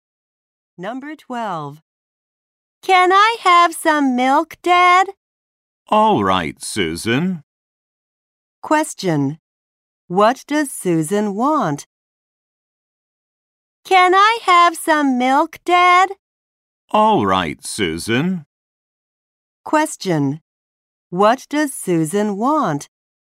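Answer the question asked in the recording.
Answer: Some milk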